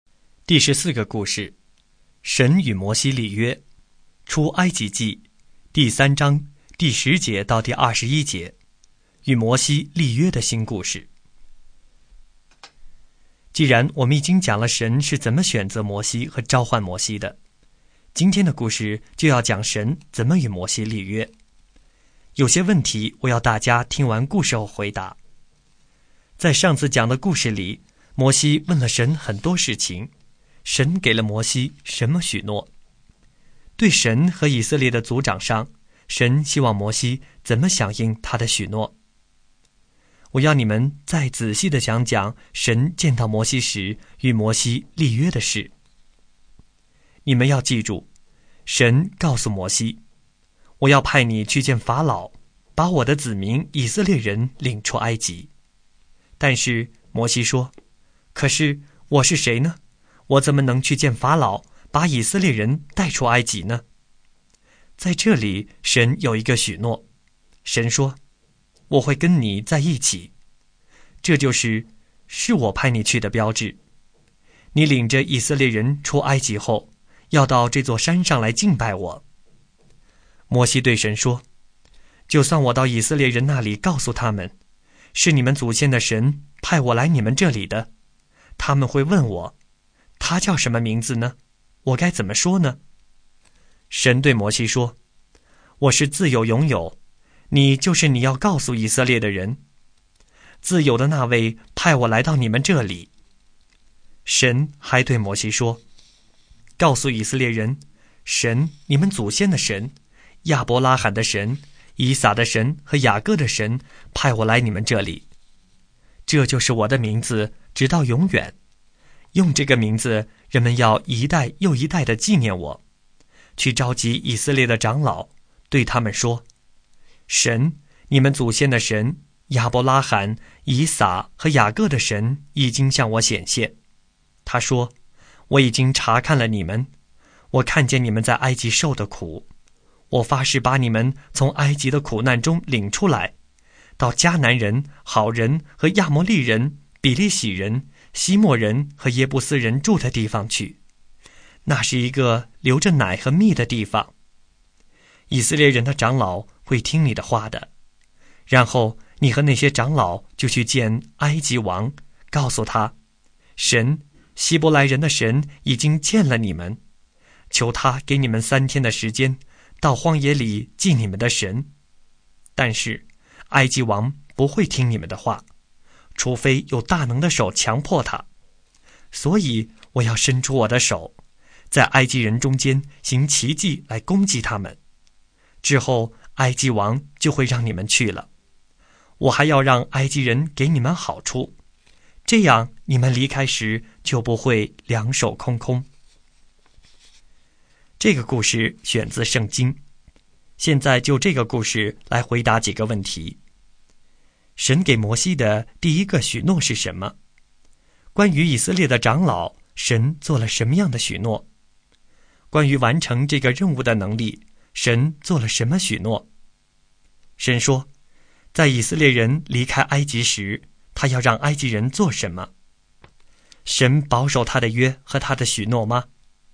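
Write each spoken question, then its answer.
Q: 神给摩西的第一个许诺是什么?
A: 神会跟摩西在一起

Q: 关于以色列的长老,神做了什么样的许诺?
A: 以色列的长老会听摩西的话

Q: 关于完成这个任务的能力,神做了什么许诺?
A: 神会伸出手,在埃及人中间行奇迹,埃及王就会让他们走

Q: 神说,在以色列人离开埃及时,他要让埃及人做什么?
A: 给以色列人好处,让他们离开时不会两手空空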